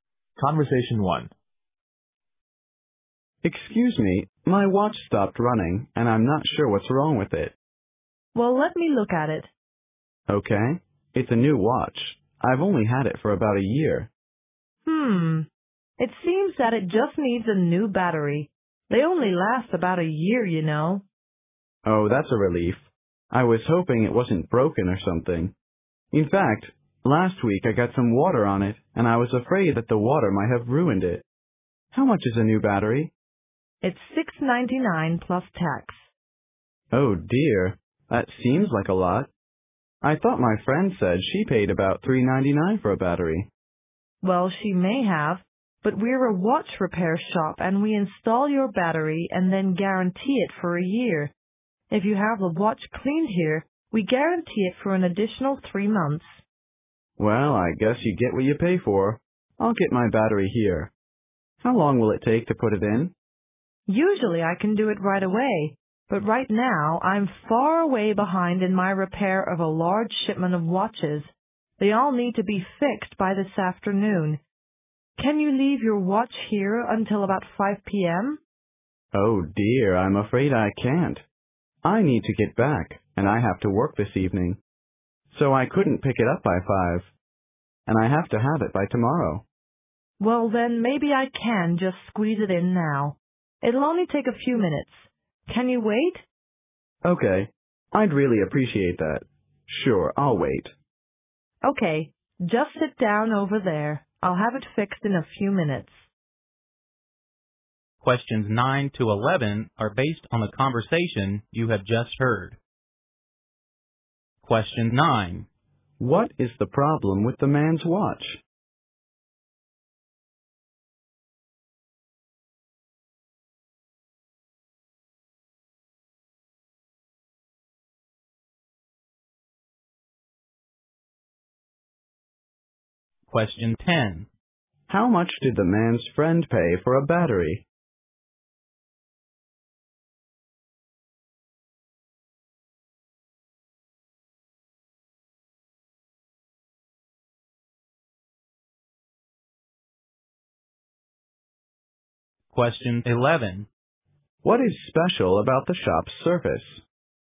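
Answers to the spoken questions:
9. It needs a new battery
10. About $3.99
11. They install the battery and guarantee it for a year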